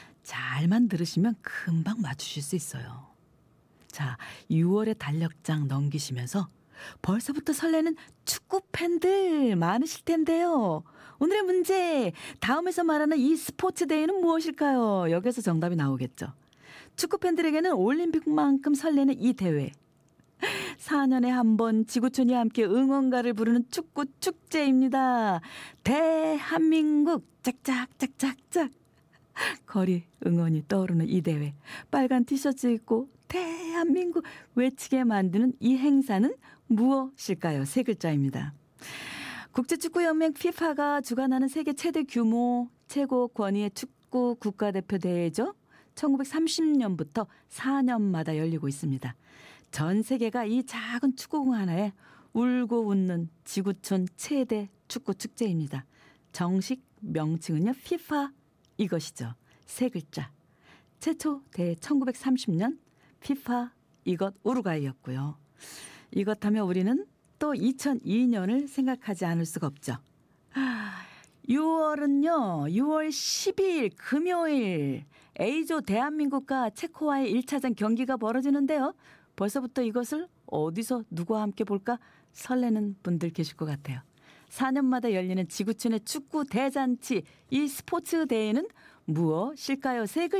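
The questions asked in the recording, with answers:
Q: 4년마다 열리는 지구촌의 축구 대잔치, 이 스포츠 대회는 무엇일까요?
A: 월드컵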